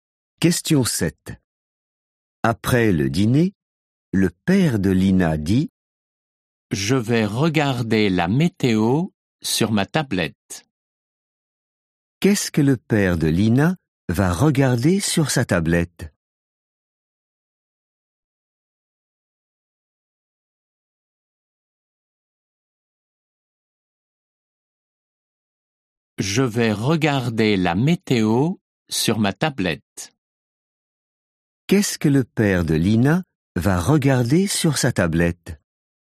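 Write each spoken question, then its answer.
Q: Qu'est-ce que le père de Lina va regarder sur sa tablette?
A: la météo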